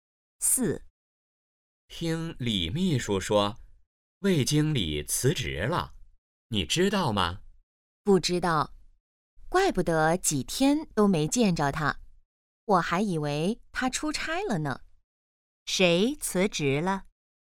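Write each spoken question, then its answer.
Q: 谁辞职了?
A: 魏经理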